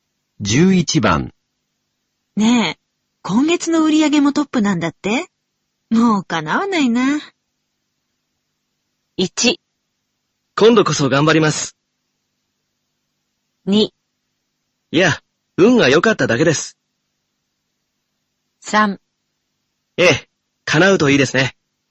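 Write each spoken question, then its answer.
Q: ねえ、今月の売り上げもトップなんだって?もうかなわないな。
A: 2: いや、運が良かっただけです。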